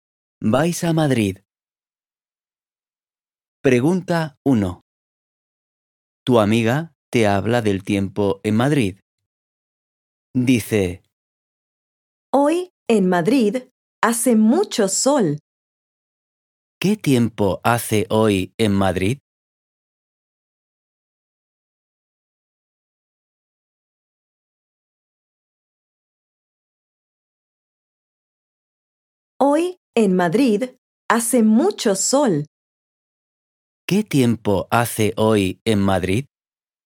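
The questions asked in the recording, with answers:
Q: ¿Qué tiempo hace hoy en Madrid?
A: Hace mucho sol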